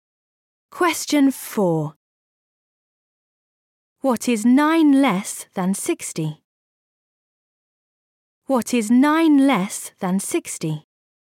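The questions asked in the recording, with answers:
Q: What is 9 less than 60?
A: 51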